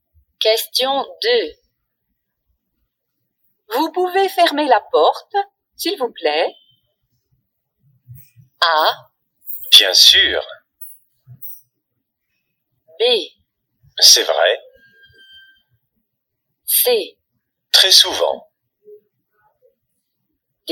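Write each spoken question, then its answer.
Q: Vous pouvez fermer la porte, s'il vous plaît?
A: A: Bien sûr.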